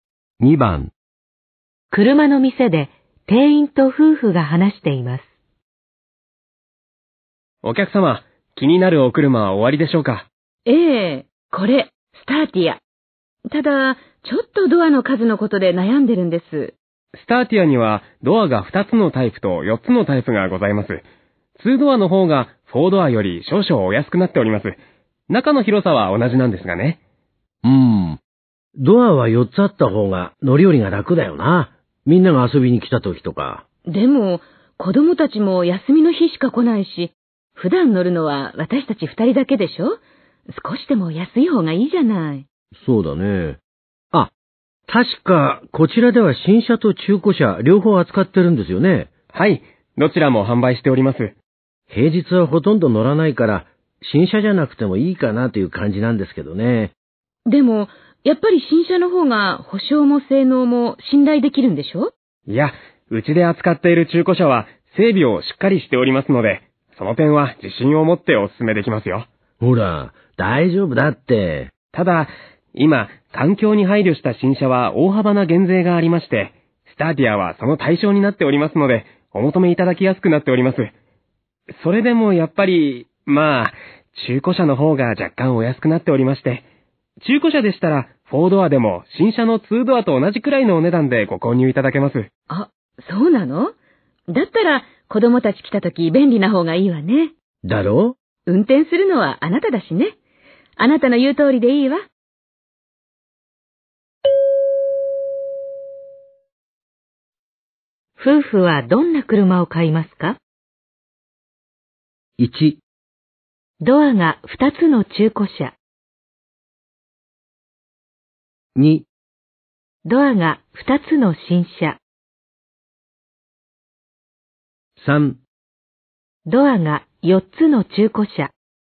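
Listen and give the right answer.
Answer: 3: ドアが4つの中古車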